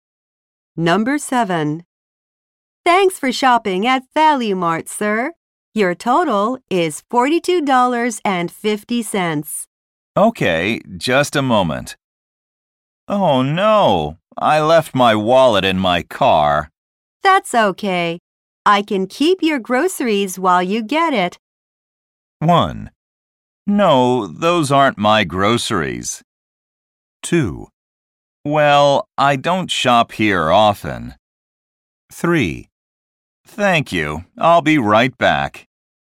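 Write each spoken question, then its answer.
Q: That's okay. I can keep your groceries while you get it.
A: 3: Thank you. I'll be right back.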